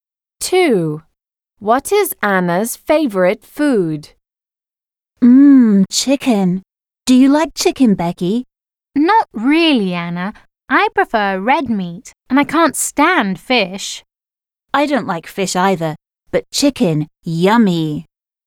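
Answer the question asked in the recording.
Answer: Chicken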